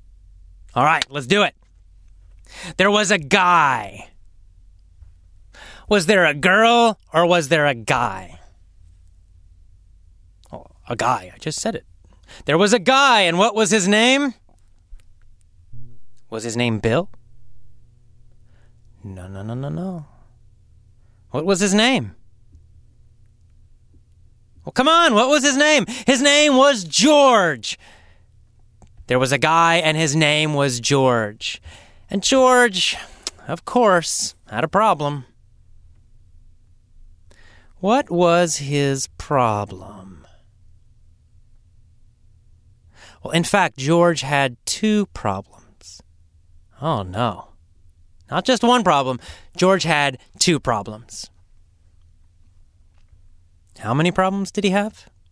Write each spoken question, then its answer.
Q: How many problems did he have?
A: Two. George had two problems.